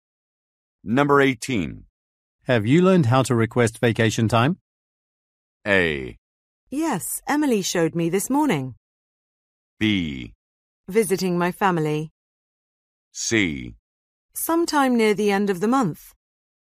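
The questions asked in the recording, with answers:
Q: Have you learned how to request vacation time?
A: A: Yes, Emily showed me this morning.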